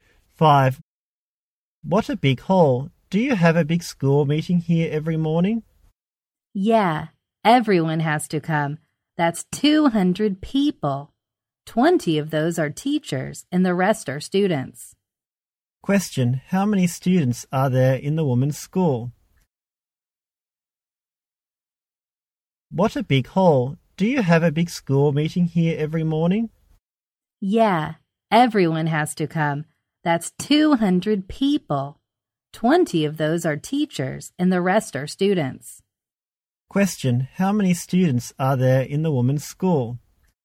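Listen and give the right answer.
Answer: 180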